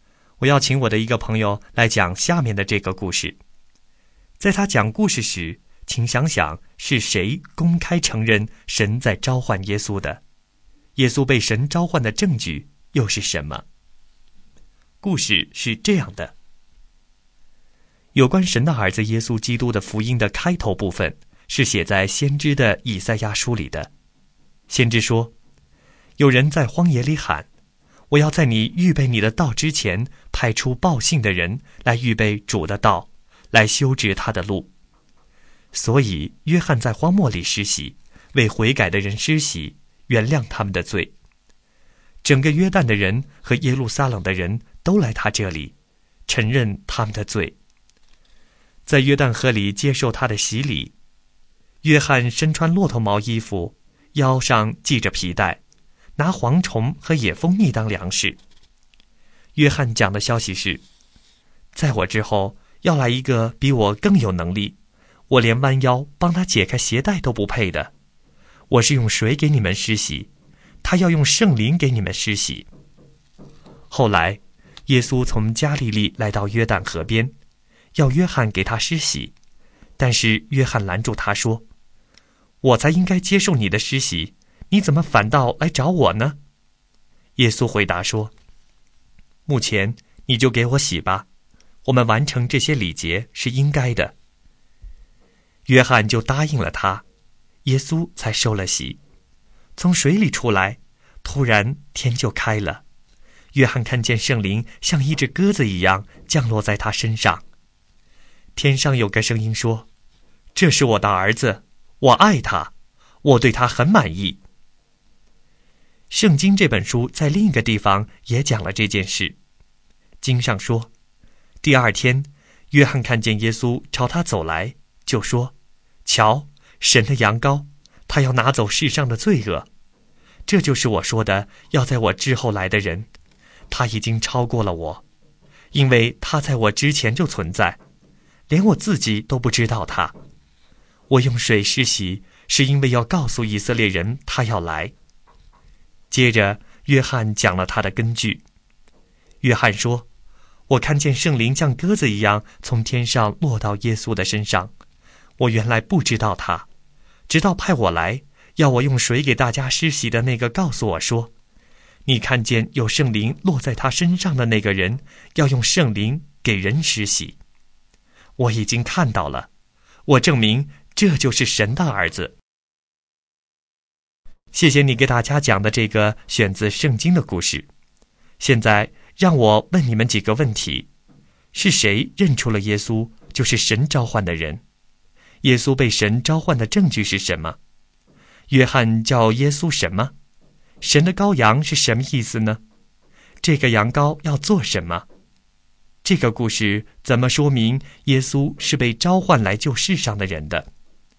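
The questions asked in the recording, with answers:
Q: 是谁认出了耶稣就是神召唤的人?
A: 施洗约翰

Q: 耶稣被神召唤的证据是什么?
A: 圣灵像鸽子一样降落在他身上,天上有声音说这是我的儿子

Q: 约翰叫耶稣什么?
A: 神的羊羔、神的儿子

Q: 这个羊羔要做什么?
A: 拿走世上的罪恶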